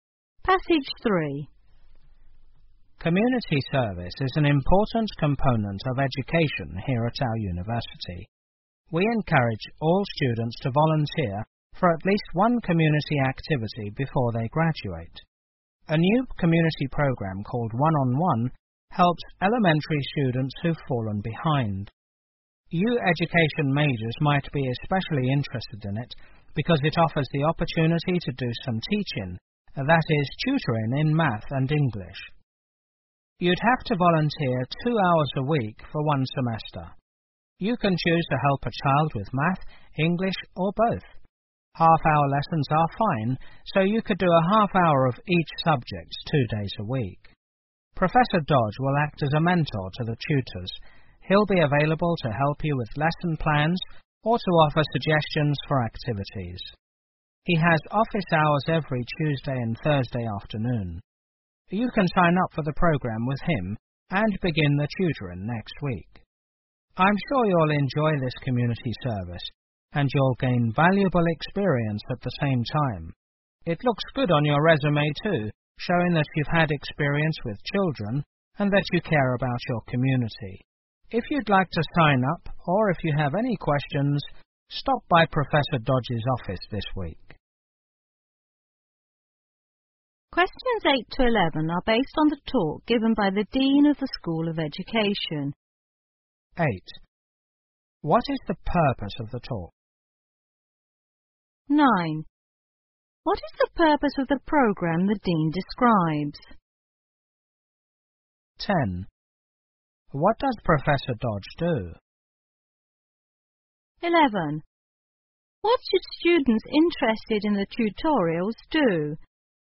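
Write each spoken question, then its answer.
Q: What is the purpose of the talk?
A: To encourage students to volunteer as tutors in the One-on-One community program

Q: What is the purpose of the program the Dean describes?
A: To help elementary students who've fallen behind

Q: What does Professor Dodge do?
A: He acts as a mentor to the tutors

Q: What should students interested in the tutorials do?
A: Stop by Professor Dodge's office this week to sign up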